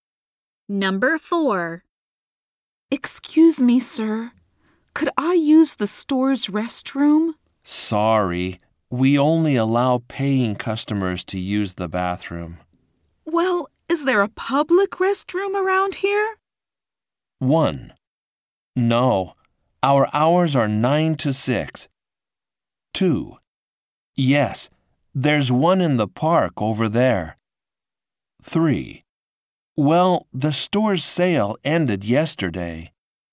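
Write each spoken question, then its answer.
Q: Well, is there a public restroom around here?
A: 2: Yes, there's one in the park over there.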